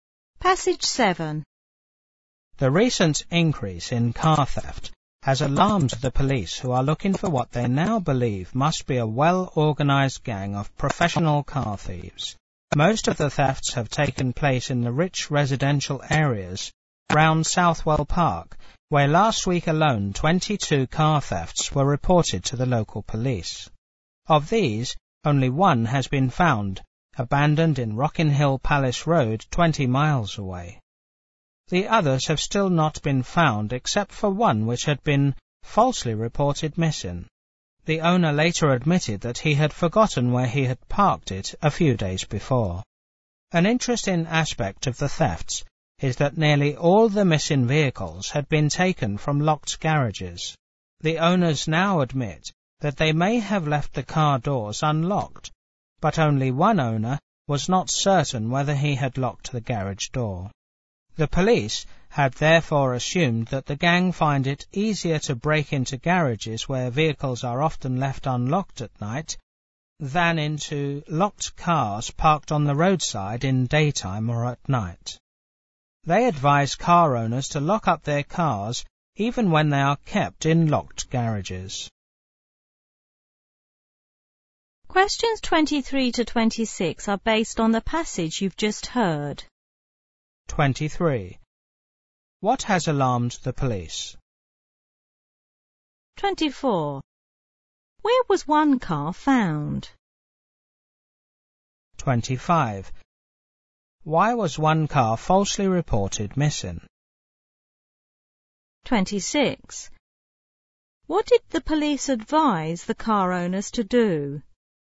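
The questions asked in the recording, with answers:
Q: What has alarmed the police?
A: The recent increase in car theft

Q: Where was one car found?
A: Abandoned in Rockin' Hill Palace Road, 20 miles away

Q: Why was one car falsely reported missing?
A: The owner had forgotten where he had parked it

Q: What did the police advise the car owners to do?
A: Lock their cars even when kept in locked garages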